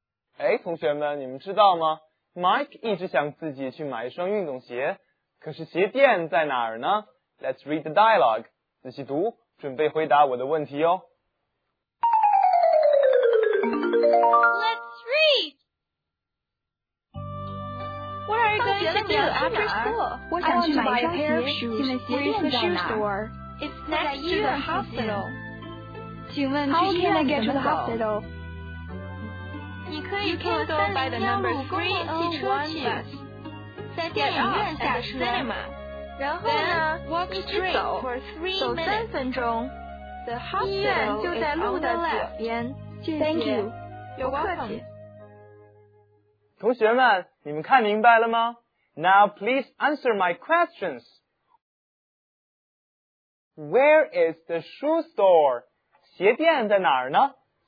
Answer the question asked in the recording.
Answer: It's next to the hospital.